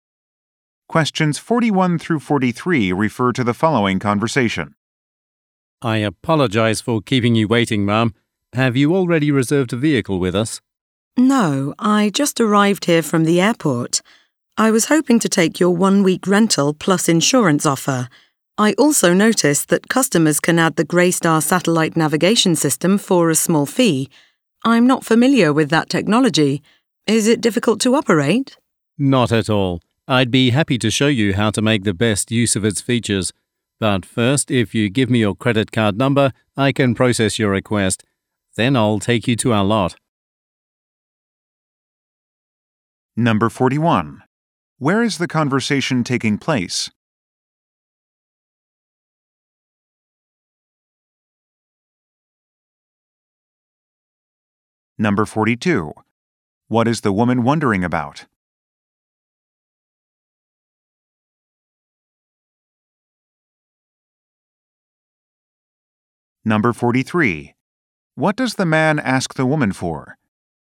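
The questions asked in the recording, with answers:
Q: Where is the conversation taking place?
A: At a car rental office

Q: What is the woman wondering about?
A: Whether the navigation system is difficult to use

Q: What does the man ask the woman for?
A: Her credit card number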